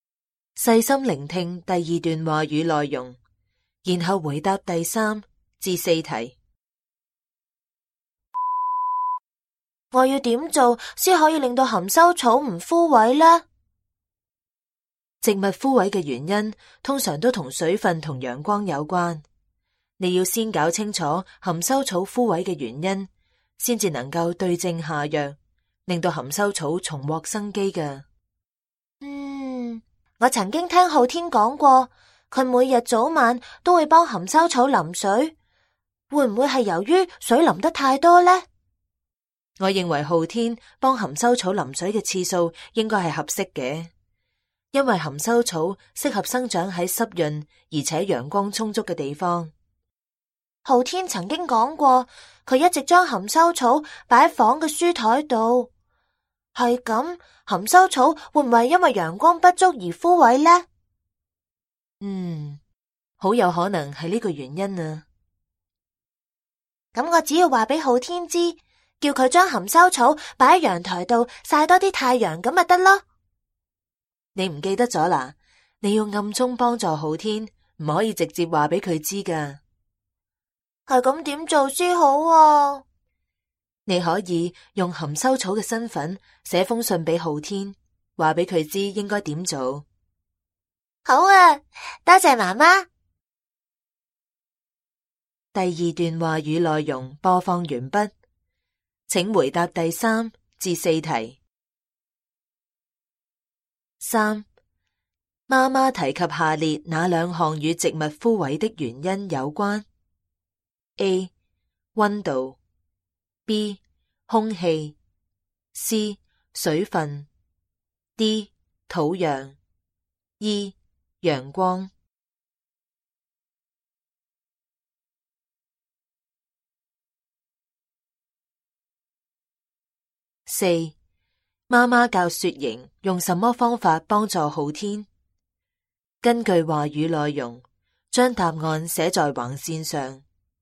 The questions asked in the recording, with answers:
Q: 妈妈教雪莹用什么方法帮助昊天?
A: 妈妈教雪莹以小天使、含羞草的身份写信给昊天,告诉他应该给含羞草多浇水、晒太阳。